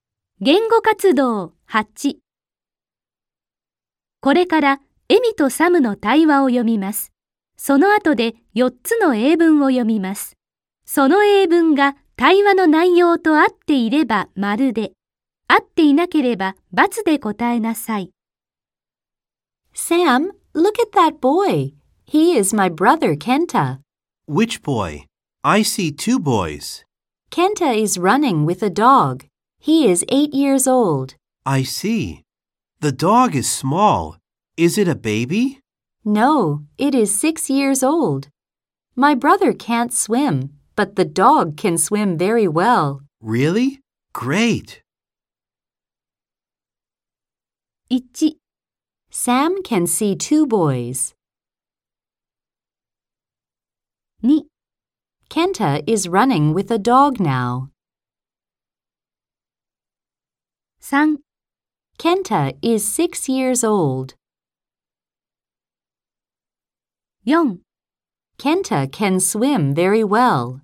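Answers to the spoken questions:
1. ○ (true)
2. ○ (true)
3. × (false)
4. × (false)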